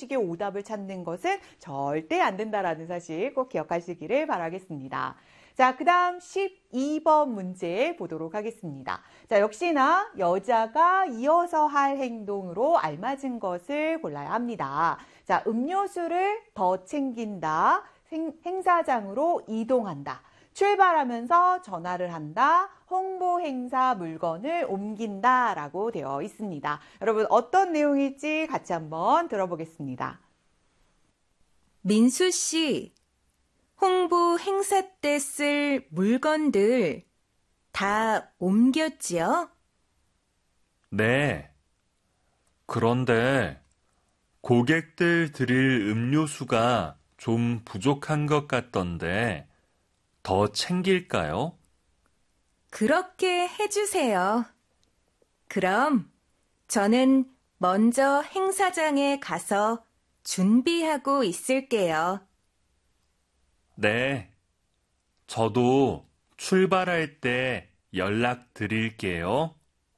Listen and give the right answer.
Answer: 행사장으로 이동한다 같은 경우가 바로 여자가 이어서 할 행동이 되겠습니다.